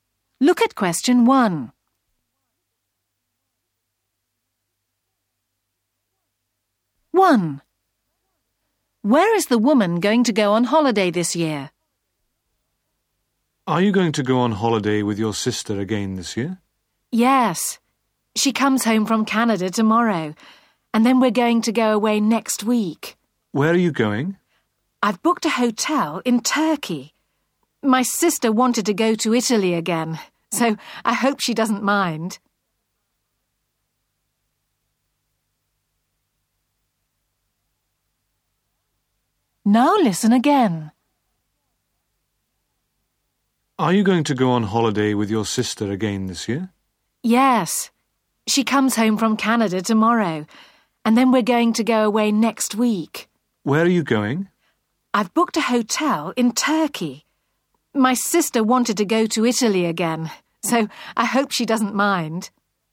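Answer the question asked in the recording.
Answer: Turkey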